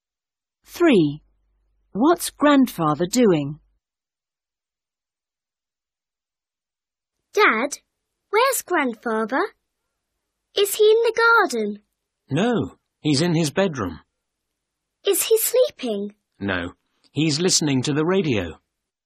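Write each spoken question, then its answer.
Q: What's Grandfather doing?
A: listening to the radio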